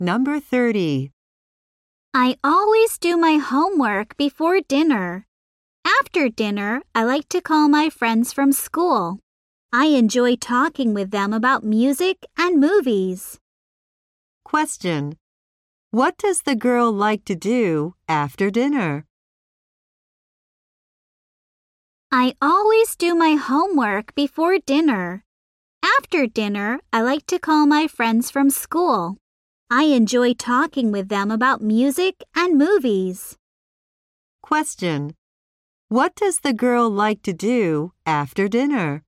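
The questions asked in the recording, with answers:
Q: What does the girl like to do after dinner?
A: Call her friends from school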